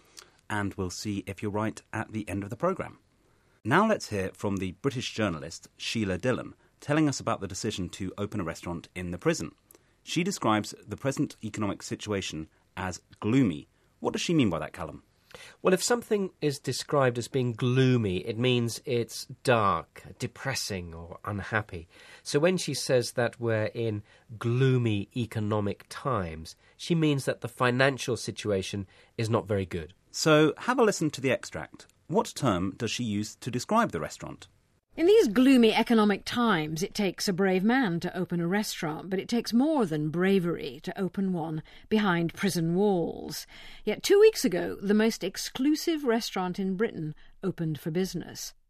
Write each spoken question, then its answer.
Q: What term does she use to describe the restaurant?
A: OK, so she describes the restaurant as exclusive.